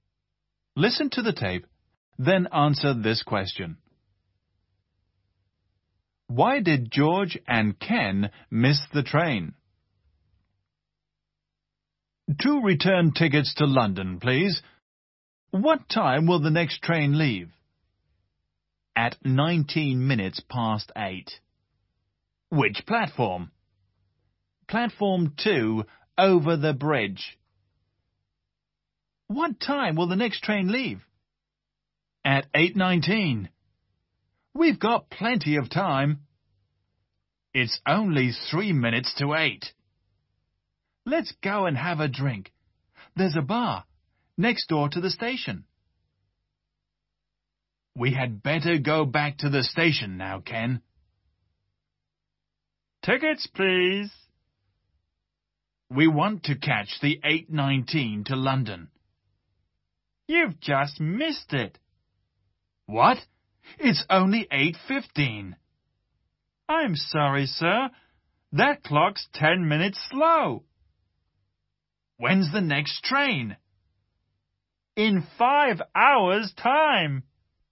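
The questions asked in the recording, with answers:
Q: Why did George and Ken miss the train?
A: Because the clock in the bar was 10 minutes slow.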